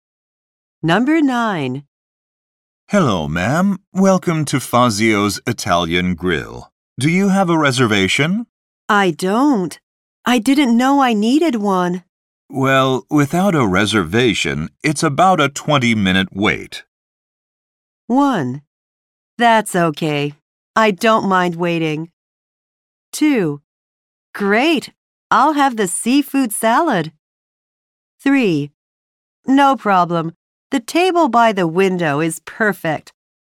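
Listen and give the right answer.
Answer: 1: That's okay. I don't mind waiting.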